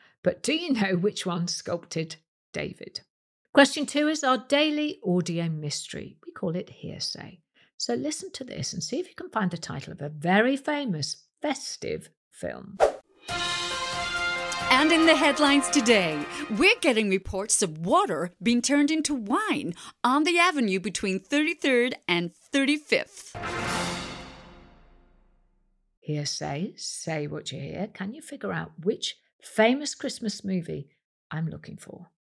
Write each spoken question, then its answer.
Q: Can you figure out which famous Christmas movie I'm looking for?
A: The film was Miracle on 34th Street.